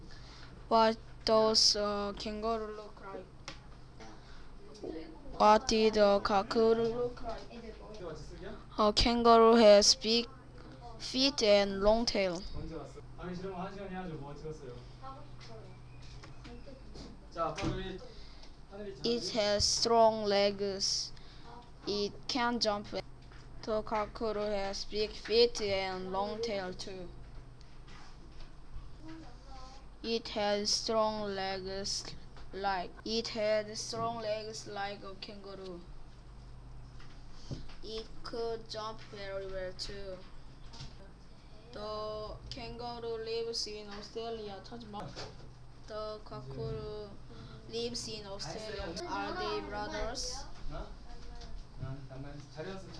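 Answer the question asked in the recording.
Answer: It had big feet, a long tail and strong legs, like a kangaroo.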